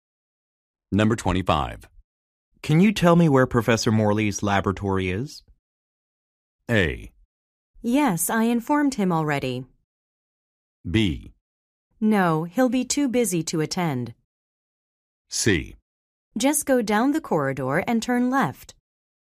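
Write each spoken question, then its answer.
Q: Can you tell me where Professor Morley's laboratory is?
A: C: Just go down the corridor and turn left.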